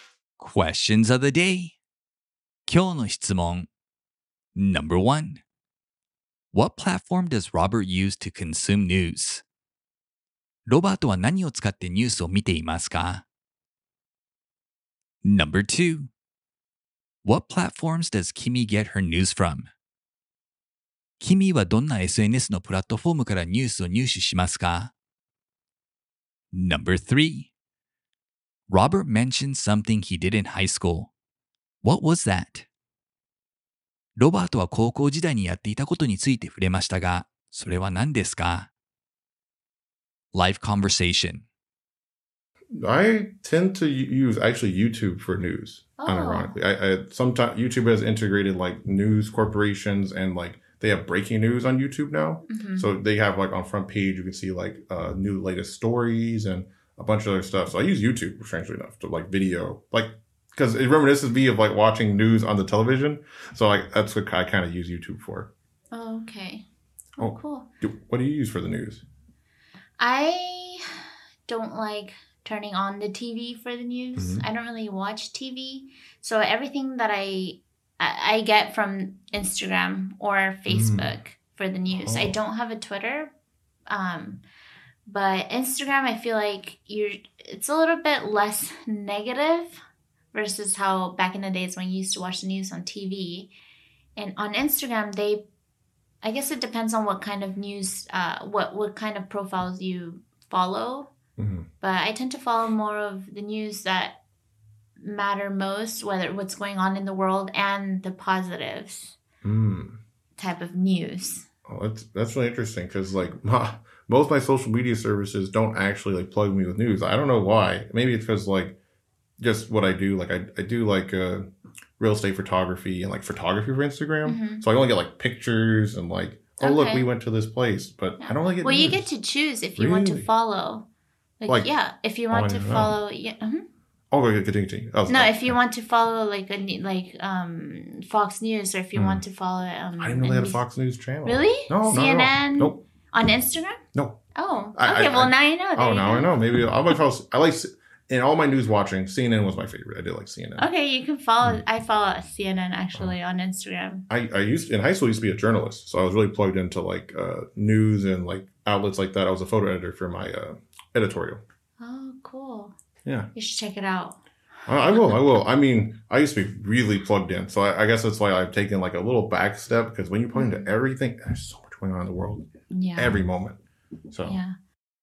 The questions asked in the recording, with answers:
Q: What platform does Robert use to consume news?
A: He uses YouTube.

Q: What platforms does Kimmy get her news from?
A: She gets her news from Facebook and Instagram.

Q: Robert mentioned something he did in high school. What was that?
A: He used to be a photo editor and journalist for his high school's editorial team.